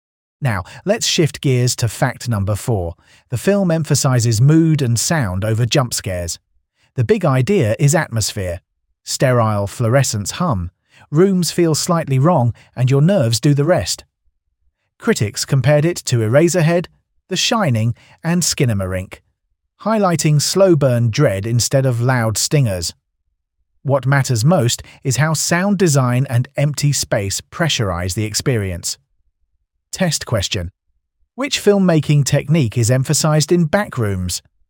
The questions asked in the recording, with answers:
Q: Which filmmaking technique is emphasized in Backrooms?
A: Correct answer. Mood and sound design.